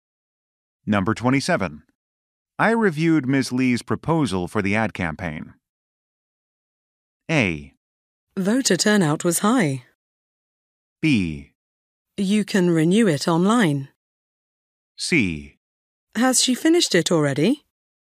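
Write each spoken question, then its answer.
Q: I reviewed Ms. Lee's proposal for the ad campaign.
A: C: Has she finished it already?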